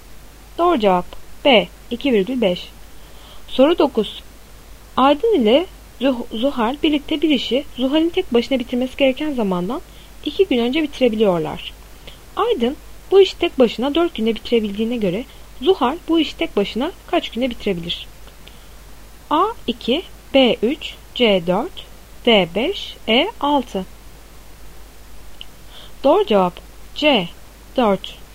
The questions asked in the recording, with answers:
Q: Aydın bu işi tek başına 4 günde bitirebildiğine göre Zuhal bu işi tek başına kaç günde bitirebilir?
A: Doğru cevap C 4.